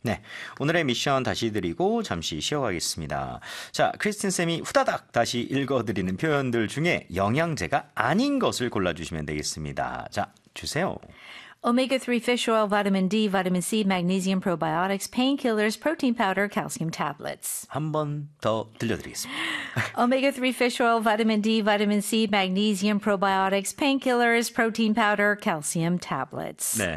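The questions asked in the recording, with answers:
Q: 자, 크리스틴 쌤이 후다닥 다시 읽어드리는 표현들 중에 영양제가 아닌 것을 골라주시면 되겠습니다.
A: painkillers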